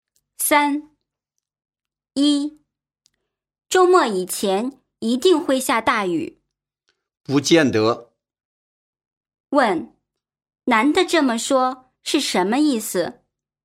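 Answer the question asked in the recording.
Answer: 不一定会下大雨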